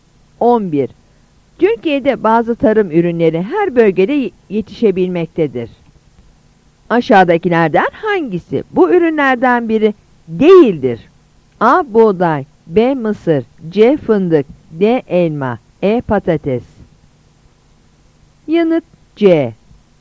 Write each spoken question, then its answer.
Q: Aşağıdakilerden hangisi bu ürünlerden biri değildir?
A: Yanıt C.